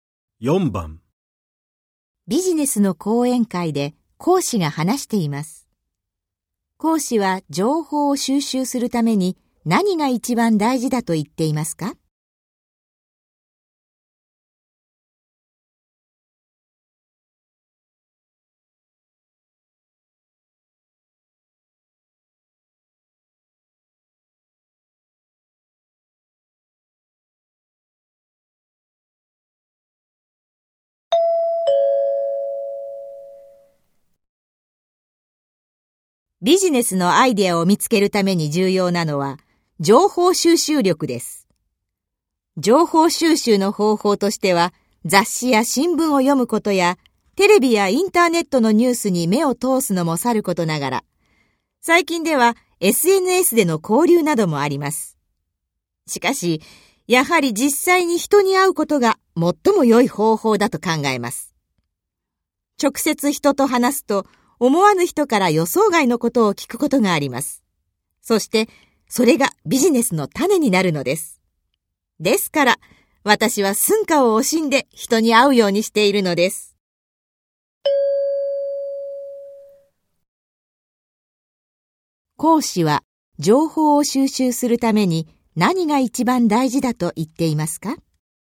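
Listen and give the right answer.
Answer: 実際に人に会うこと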